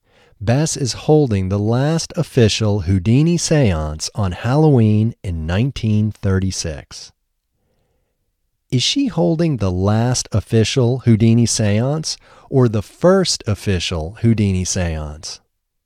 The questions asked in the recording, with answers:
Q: Is she holding the last official Houdini seance or the first official Houdini seance?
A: She is holding the last official Houdini seance.